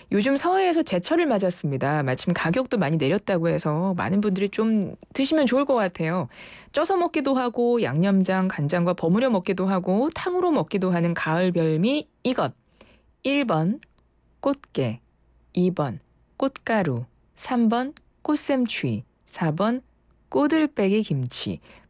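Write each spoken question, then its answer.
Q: 쪄서 먹기도 하고 양념장 간장과 버무려 먹기도 하고 탕으로 먹기도 하는 가을 별미 이것.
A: 1: 꽃게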